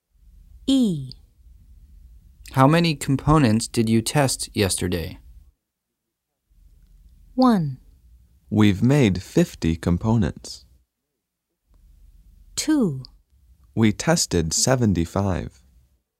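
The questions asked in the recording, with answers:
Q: How many components did you test yesterday?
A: 2: We tested 75.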